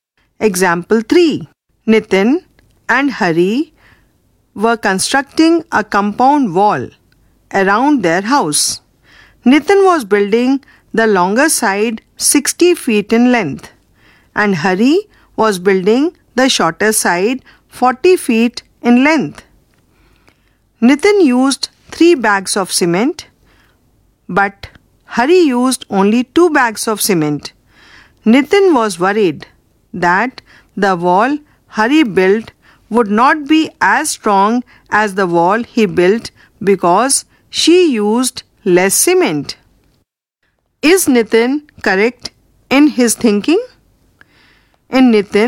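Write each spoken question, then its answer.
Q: Is Nitin correct in his thinking?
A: No; 60:40 and 3:2 are proportional, so both walls are equally strong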